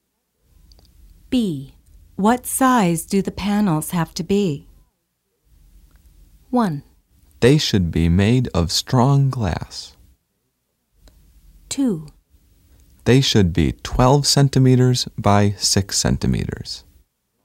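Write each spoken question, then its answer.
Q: What size do the panels have to be?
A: 2: They should be 12 centimeters by 6 centimeters.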